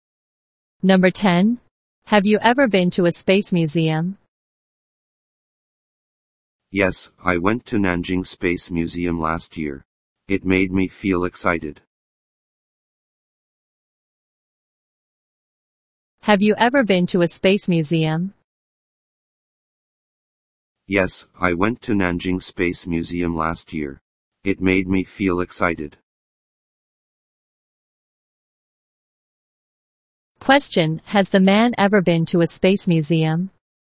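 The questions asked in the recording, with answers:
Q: has the man ever been to a space museum?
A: Yes, he has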